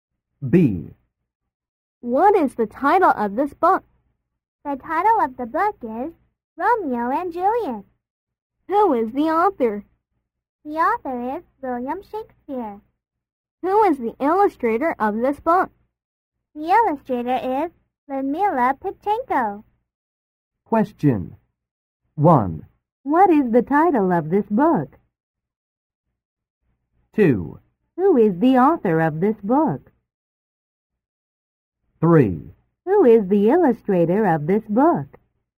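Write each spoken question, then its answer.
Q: What is the title of this book?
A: Romeo and Juliet

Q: Who is the author of this book?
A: William Shakespeare

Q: Who is the illustrator of this book?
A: Ludmila Pitchenko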